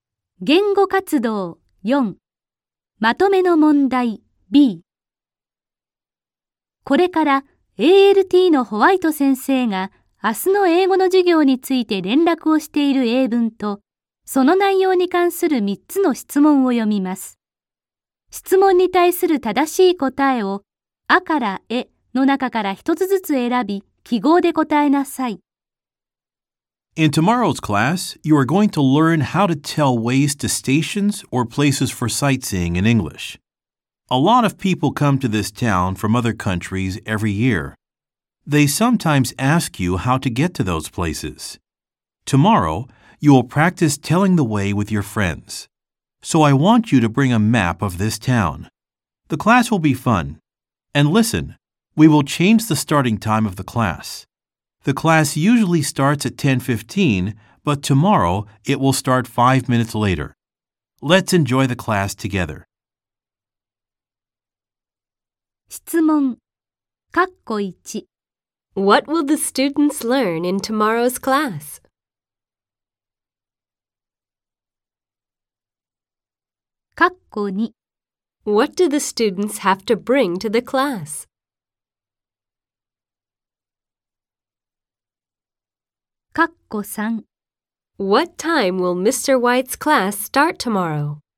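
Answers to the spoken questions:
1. How to tell ways to stations or places for sightseeing in English
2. A map of this town
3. At 10:20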